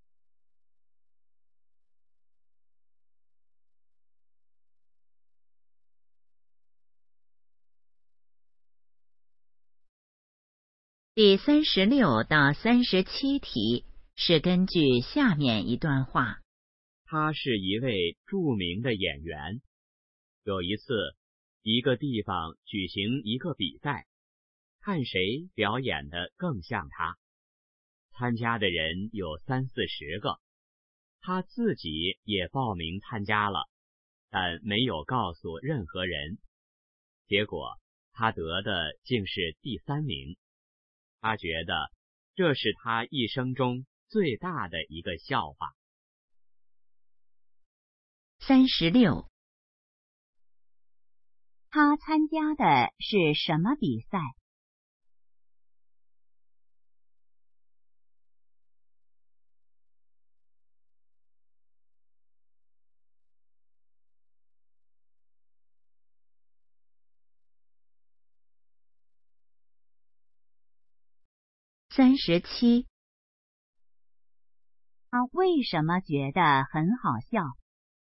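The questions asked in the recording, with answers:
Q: 他参加的是什么比赛?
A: 看谁表演得更像他的比赛

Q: 他为什么觉得很好笑?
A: 他自己只得了第三名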